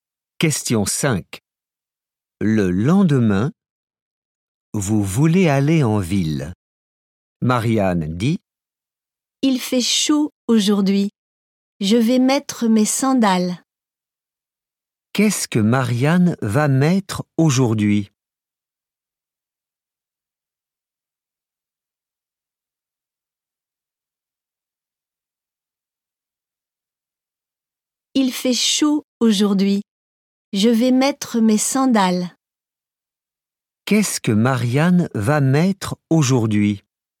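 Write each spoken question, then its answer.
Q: Qu'est-ce que Marianne va mettre aujourd'hui ?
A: Ses sandales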